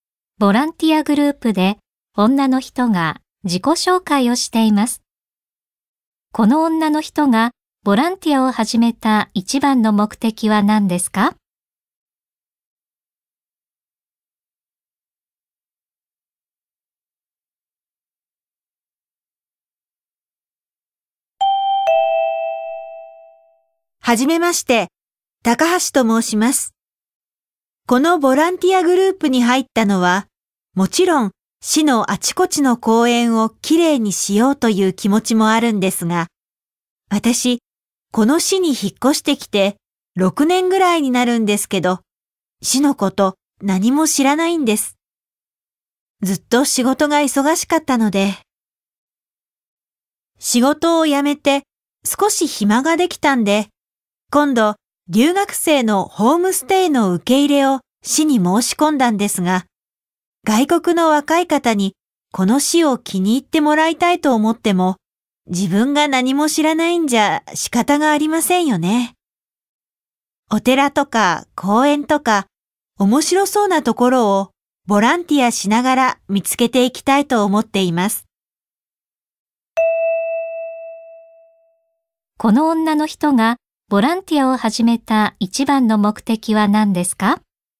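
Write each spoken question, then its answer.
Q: この女の人がボランティアを始めた一番の目的は何ですか?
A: 市のことを知るため(留学生に紹介できる面白い場所を見つけるため)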